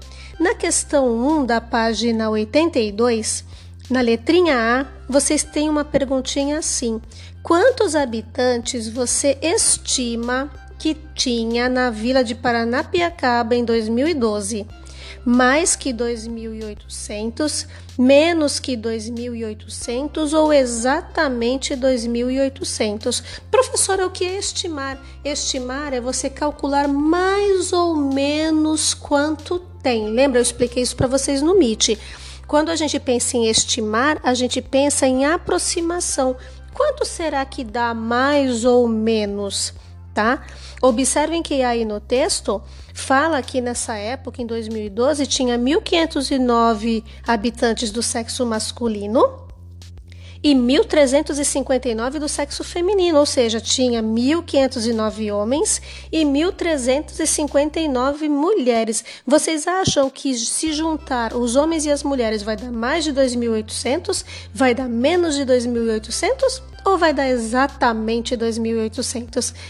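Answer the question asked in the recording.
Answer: Mais que 2.800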